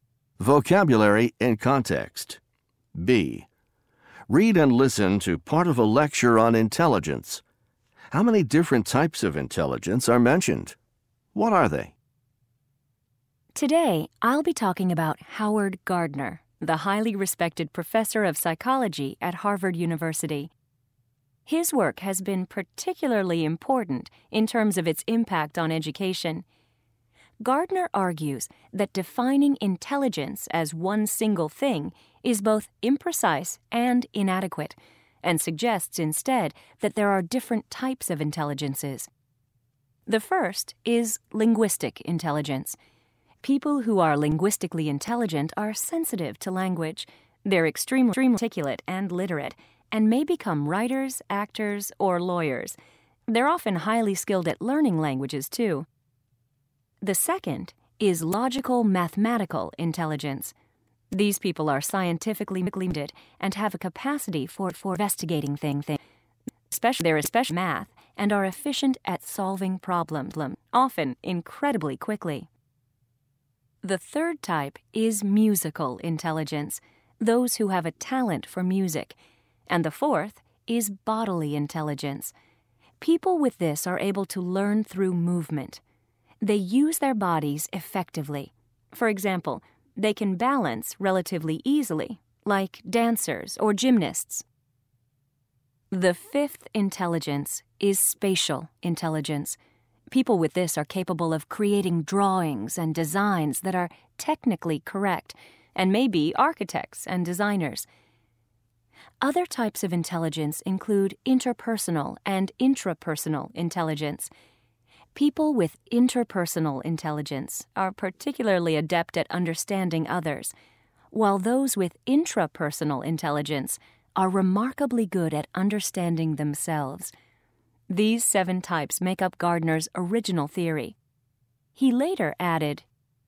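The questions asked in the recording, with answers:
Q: How many different types of intelligence are mentioned?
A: Seven

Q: What are they?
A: Linguistic, logical-mathematical, musical, bodily, spatial, interpersonal and intrapersonal intelligence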